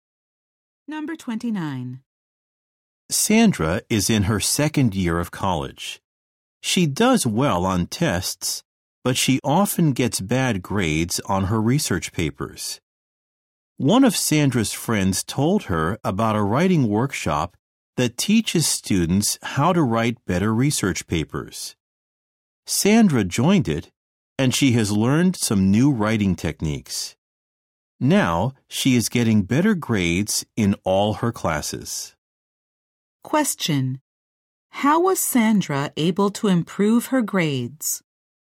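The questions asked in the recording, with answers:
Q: How was Sandra able to improve her grades?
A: She joined a writing workshop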